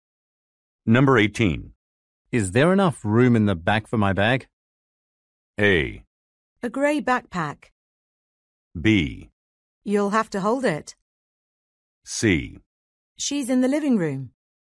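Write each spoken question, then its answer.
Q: Is there enough room in the back for my bag?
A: B: You'll have to hold it.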